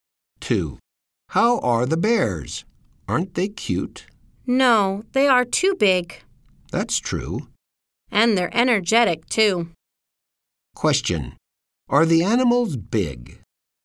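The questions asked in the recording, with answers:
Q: Are the animals big?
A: Yes, they are.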